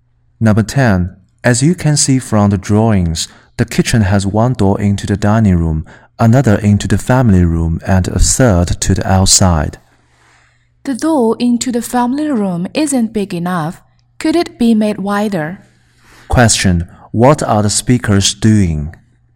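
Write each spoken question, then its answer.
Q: What are the speakers doing?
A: Discussing the design of a house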